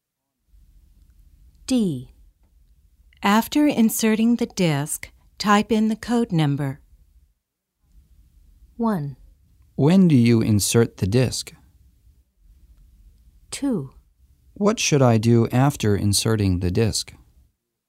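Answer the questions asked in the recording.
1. Before typing in the code number.
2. Type in the code number.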